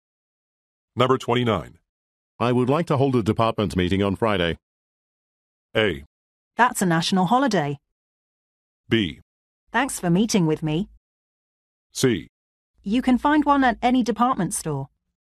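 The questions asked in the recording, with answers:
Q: I would like to hold a department meeting on Friday.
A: A: That's a national holiday.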